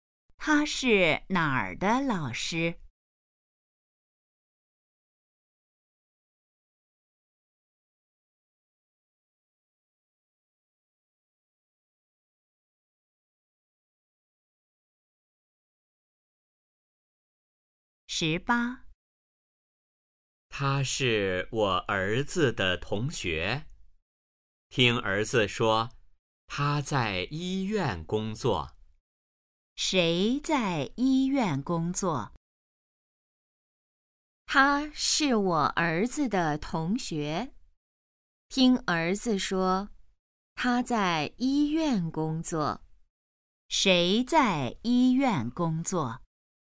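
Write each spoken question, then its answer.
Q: 谁在医院工作?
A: 儿子的同学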